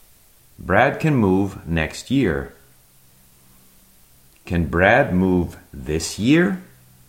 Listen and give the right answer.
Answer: No, not this year. Brad can't move this year.